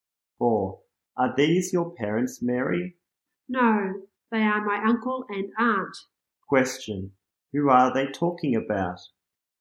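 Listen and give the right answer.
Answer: Mary's uncle and aunt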